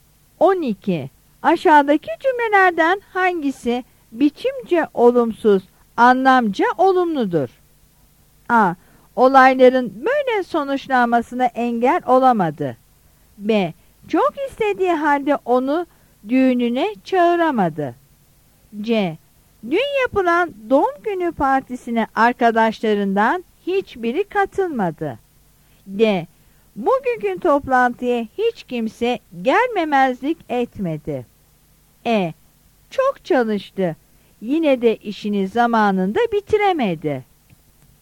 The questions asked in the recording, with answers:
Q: Aşağıdaki cümlelerden hangisi biçimce olumsuz, anlamca olumludur?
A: Yanıt D'dir.